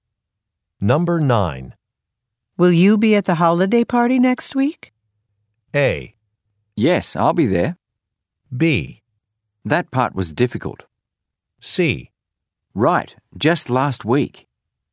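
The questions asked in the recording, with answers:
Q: Will you be at the holiday party next week?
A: A: Yes, I'll be there.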